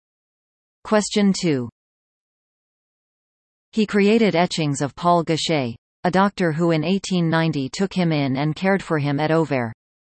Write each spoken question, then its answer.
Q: He created etchings of Paul Gachet, a doctor who in 1890 took him in and cared for him at Auvers.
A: The answer? Van Gogh.